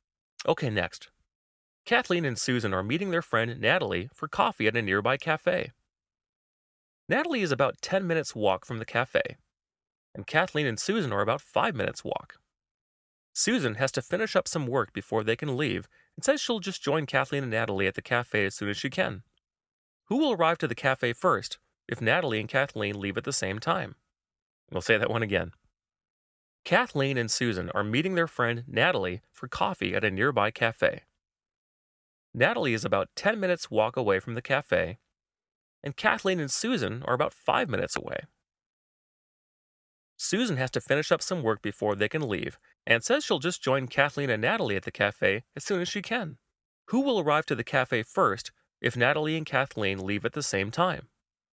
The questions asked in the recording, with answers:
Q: Who will arrive to the cafe first if Natalie and Kathleen leave at the same time?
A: Well, the correct answer would be Kathleen, as she's just 5 minutes away compared to Natalie, who is 10 minutes away.